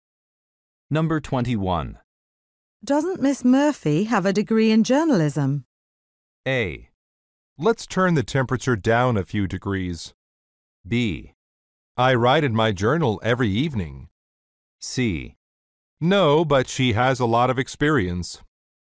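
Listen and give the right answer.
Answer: C: No, but she has a lot of experience.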